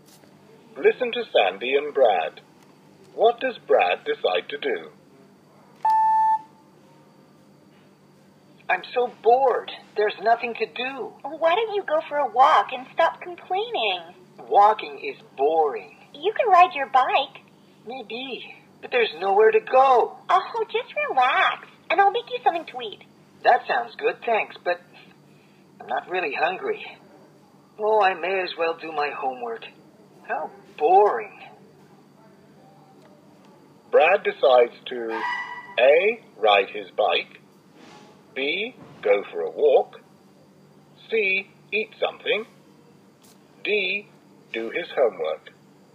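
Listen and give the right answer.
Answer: D: do his homework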